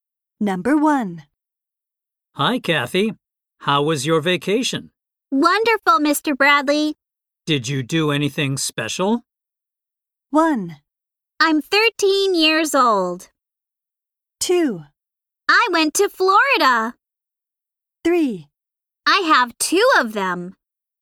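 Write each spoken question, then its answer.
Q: Did you do anything special?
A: 2: I went to Florida.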